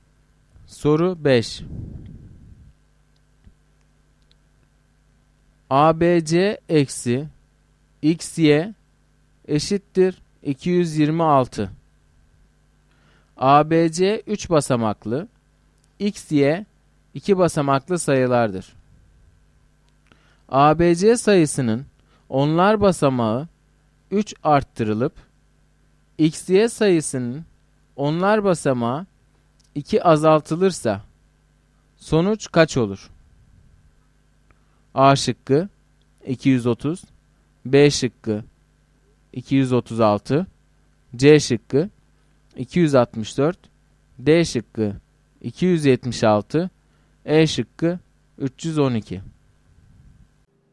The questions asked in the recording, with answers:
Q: ABC sayısının onlar basamağı 3 arttırılıp, XY sayısının onlar basamağı 2 azaltılırsa sonuç kaç olur?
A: Doğru cevap D şıkkı.